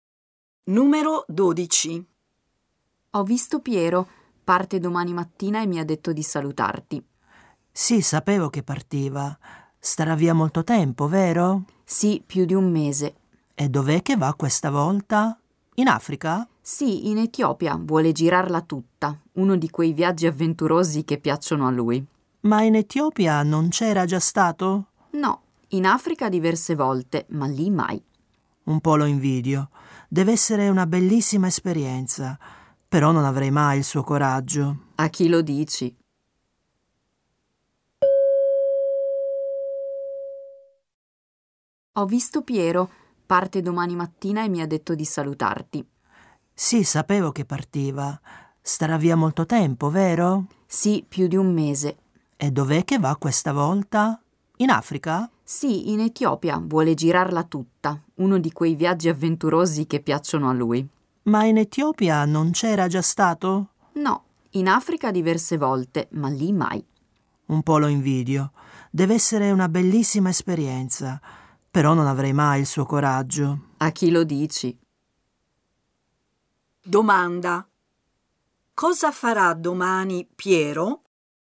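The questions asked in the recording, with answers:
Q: Domanda. Cosa farà domani Piero?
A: Partirà per un viaggio in Etiopia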